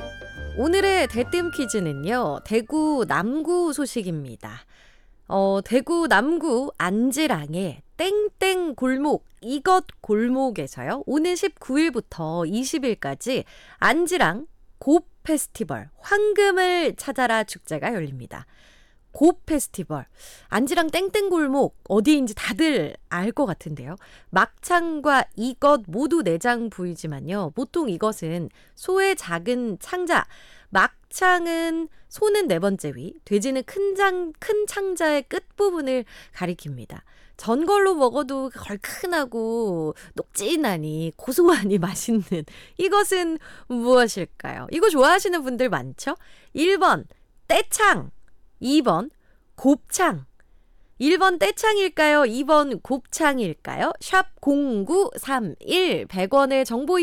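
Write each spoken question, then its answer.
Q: 전골로 먹어도 얼큰하고 녹진하니 고소하니 맛있는 이것은 무엇일까요?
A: 2: 곱창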